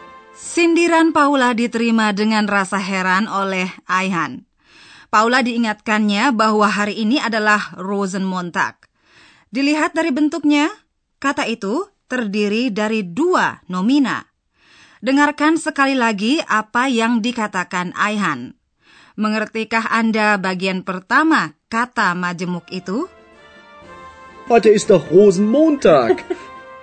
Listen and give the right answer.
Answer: Bagian pertama kata itu menyebutkan sejenis bunga, yaitu rose atau mawar, rose.